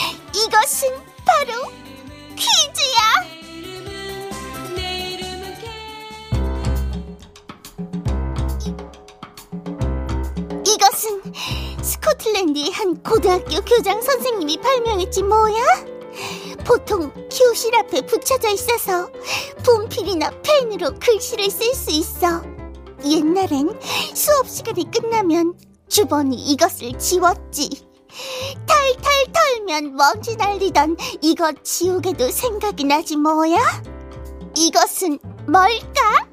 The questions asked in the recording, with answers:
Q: 이것은 뭘까?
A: 정답은 칠판이었습니다.